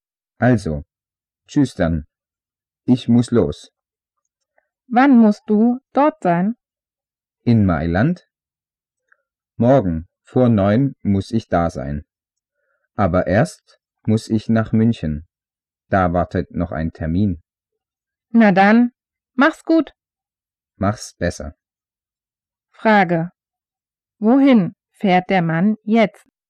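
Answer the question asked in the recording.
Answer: Nach München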